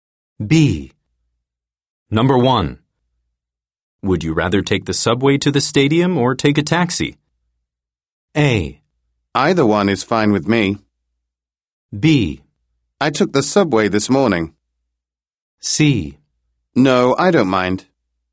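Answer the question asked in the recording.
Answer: A: Either one is fine with me.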